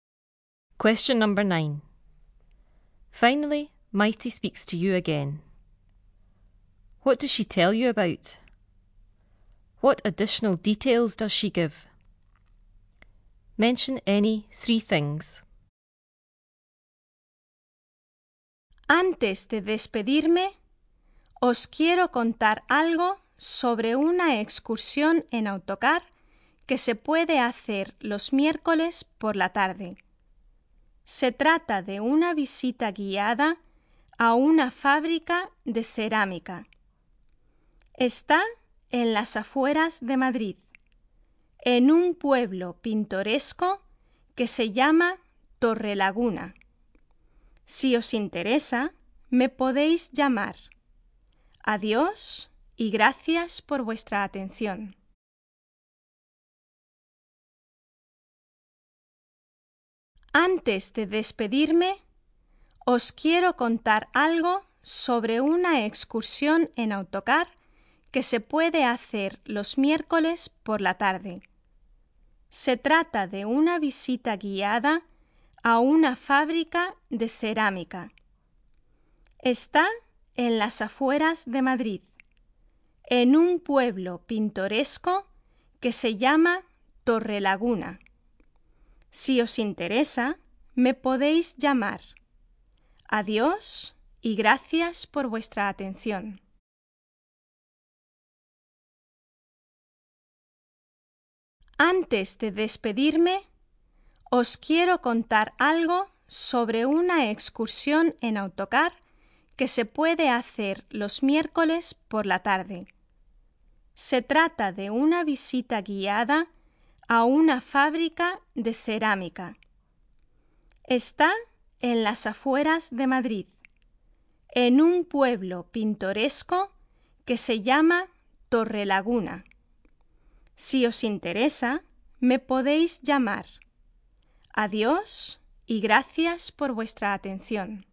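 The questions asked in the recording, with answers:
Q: What does she tell you about?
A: A coach excursion on Wednesday afternoons

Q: What additional details does she give?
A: It is a guided visit to a ceramics factory on the outskirts of Madrid, in a picturesque village called Torrelaguna; you can phone her if interested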